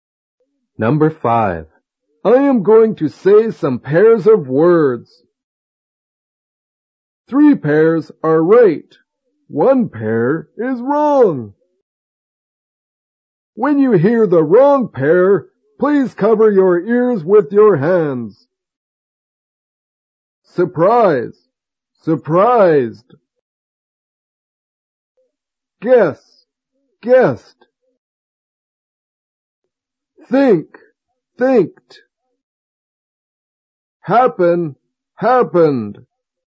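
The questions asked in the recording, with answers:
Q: When you hear the wrong pair, please cover your ears with your hands.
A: Think. Thinked.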